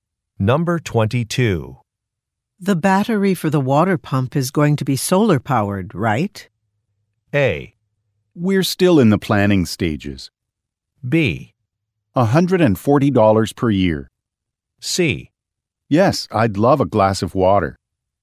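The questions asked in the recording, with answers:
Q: The battery for the water pump is going to be solar-powered, right?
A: A: We're still in the planning stages.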